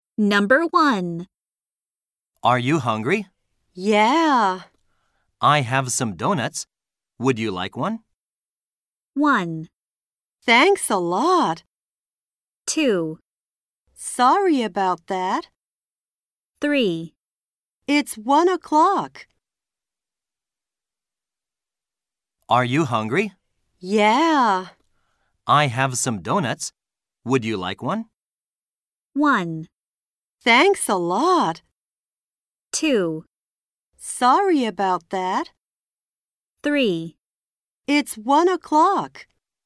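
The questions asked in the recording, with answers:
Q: I have some donuts. Would you like one?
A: 1: Thanks a lot.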